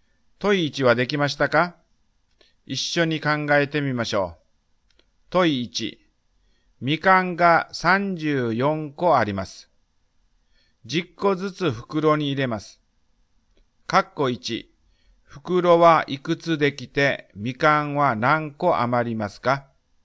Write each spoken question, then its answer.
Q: 括弧1、袋はいくつできてみかんは何個余りますか?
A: すると、3余り4です。2袋、3袋できて4個余るのです。